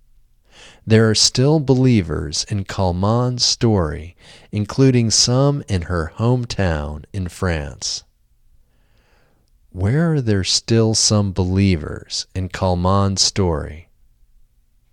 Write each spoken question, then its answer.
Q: Where are there still some believers in Kalman's story?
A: There are still some believers in Kalman's story in her hometown in France.